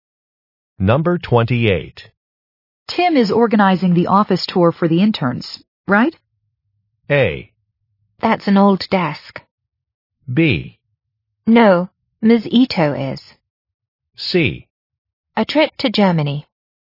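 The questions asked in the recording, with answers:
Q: Tim is organizing the office tour for the interns, right?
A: B: No, Ms. Ito is.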